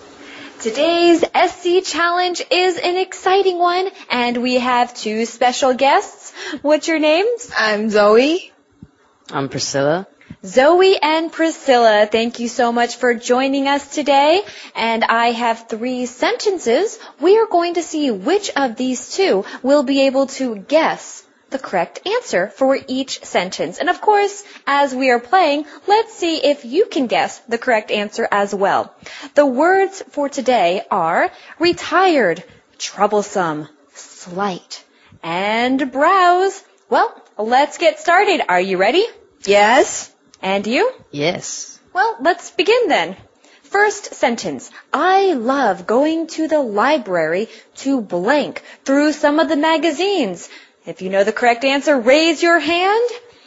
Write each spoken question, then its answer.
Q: I love going to the library to blank through some of the magazines.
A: Browse.